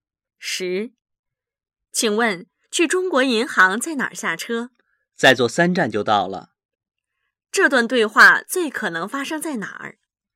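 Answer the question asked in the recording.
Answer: 公共汽车上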